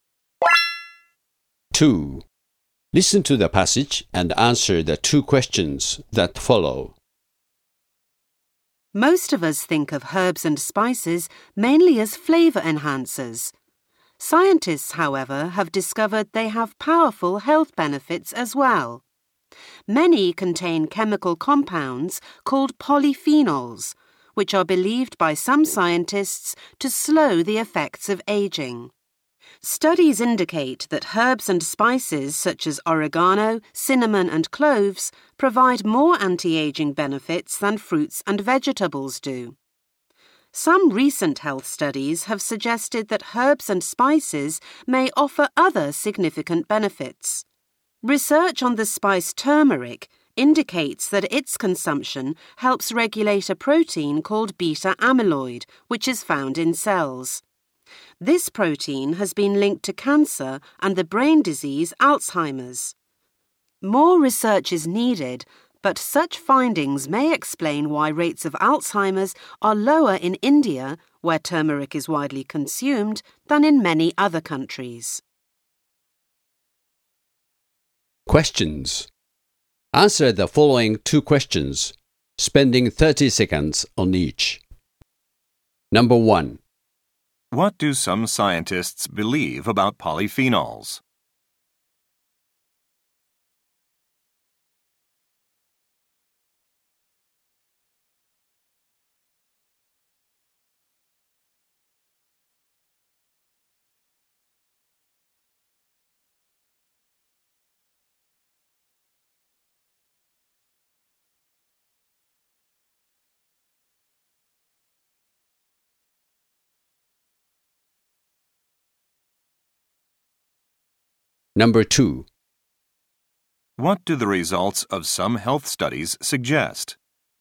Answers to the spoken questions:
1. Some scientists believe that polyphenols may be able to slow the aging process.
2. Recent health studies have shown that some herbs and spices may have significant health benefits related to cancer and diseases of the brain.